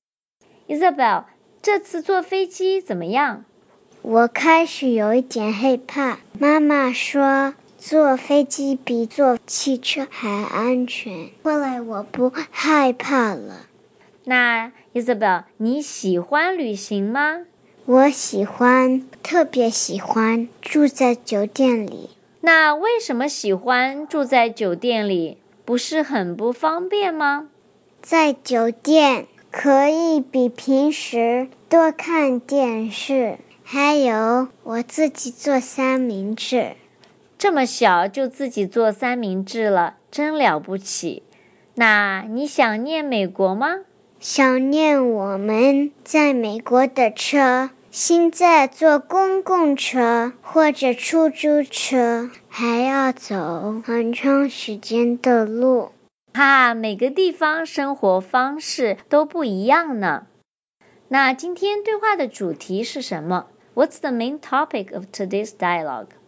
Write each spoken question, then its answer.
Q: What's the main topic of today's dialogue?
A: 今天是 Isabel 小朋友谈论她的旅行。